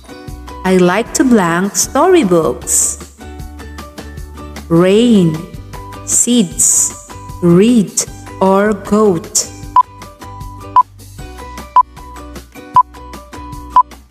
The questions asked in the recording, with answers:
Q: I like to blank storybooks.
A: The answer is read.